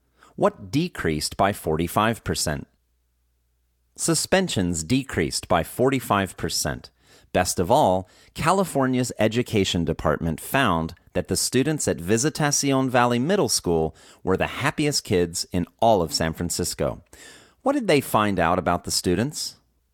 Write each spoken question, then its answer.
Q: What did they find out about the students?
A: They found out that the students were the happiest kids in all of San Francisco.